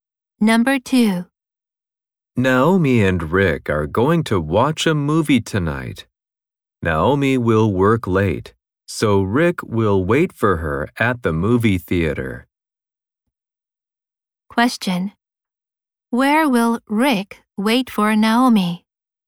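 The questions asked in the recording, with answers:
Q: Where will Rick wait for Naomi?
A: At the movie theater.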